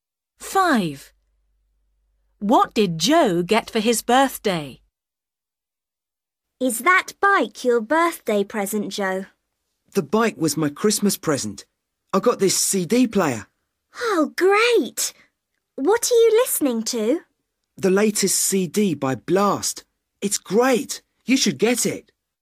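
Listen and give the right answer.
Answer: A CD player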